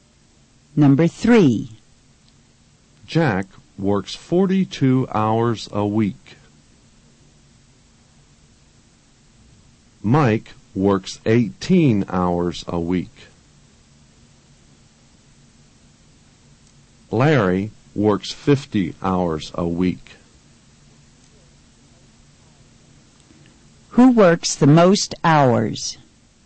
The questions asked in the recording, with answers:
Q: Who works the most hours?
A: Larry works the most hours.